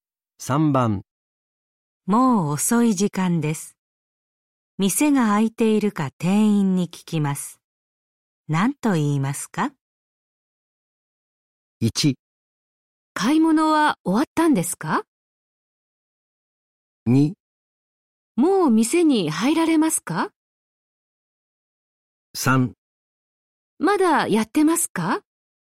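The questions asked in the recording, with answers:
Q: 何と言いますか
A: 3: まだやってますか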